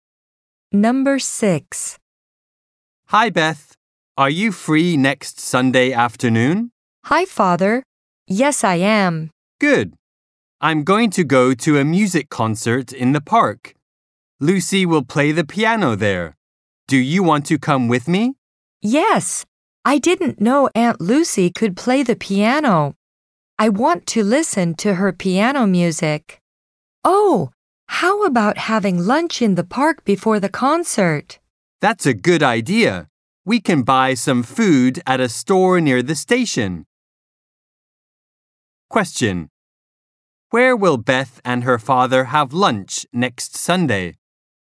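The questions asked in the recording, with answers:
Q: Where will Beth and her father have lunch next Sunday?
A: In the park.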